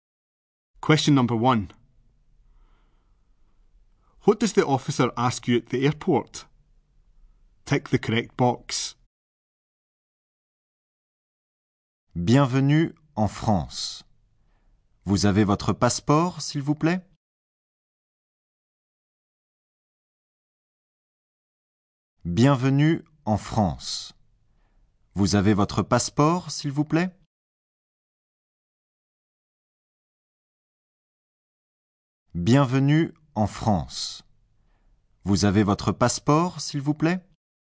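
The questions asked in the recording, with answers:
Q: What does the officer ask you at the airport?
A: Whether you have your passport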